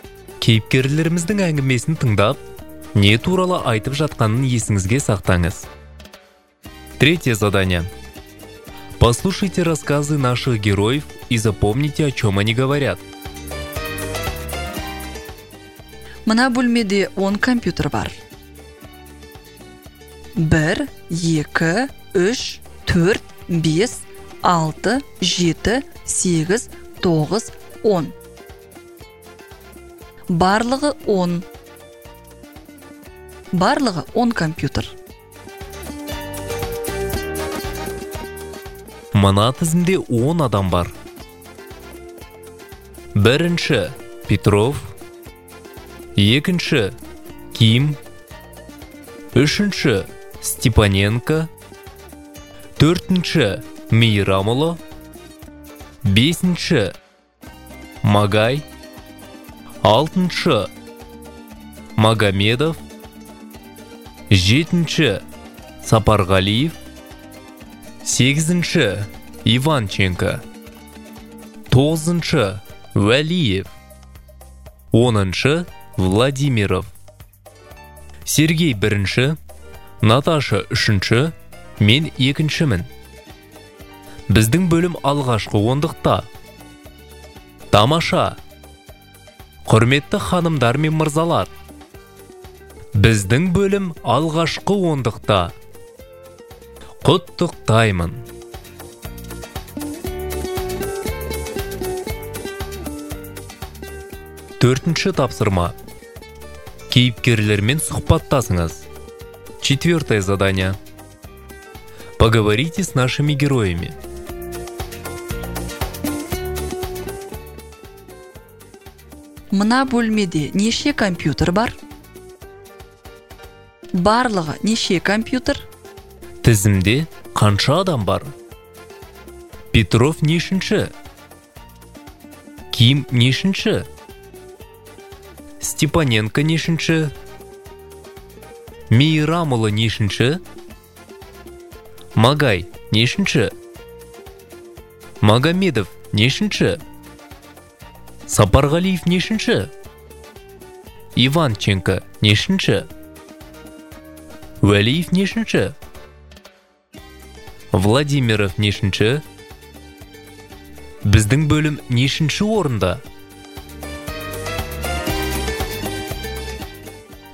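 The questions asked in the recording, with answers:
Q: Мына бөлмеде неше компьютер бар?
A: 10 компьютер

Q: Барлығы неше компьютер?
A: 10

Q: Тізімде қанша адам бар?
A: 10 адам

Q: Петров нешінші?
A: бірінші

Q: Ким нешінші?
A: екінші

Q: Степаненко нешінші?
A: үшінші

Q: Мейрамұлы нешінші?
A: төртінші

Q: Магай нешінші?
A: бесінші

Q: Магомедов нешінші?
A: алтыншы

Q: Сапарғалиев нешінші?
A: жетінші

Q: Иванченко нешінші?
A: сегізінші

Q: Уәлиев нешінші?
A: тоғызыншы

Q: Владимиров нешінші?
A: оныншы

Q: Біздің бөлім нешінші орында?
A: алғашқы ондықта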